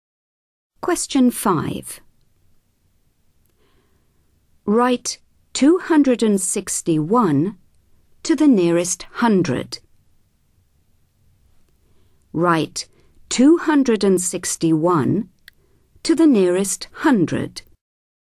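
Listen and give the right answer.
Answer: 300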